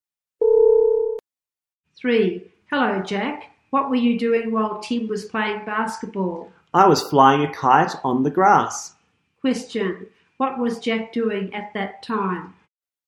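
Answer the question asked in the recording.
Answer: Flying a kite on the grass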